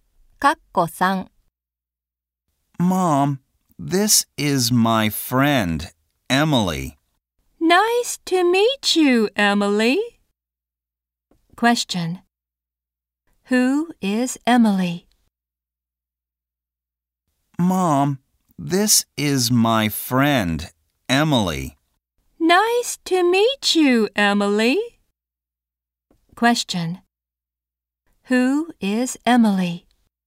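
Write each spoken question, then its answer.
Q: Who is Emily?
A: The speaker's friend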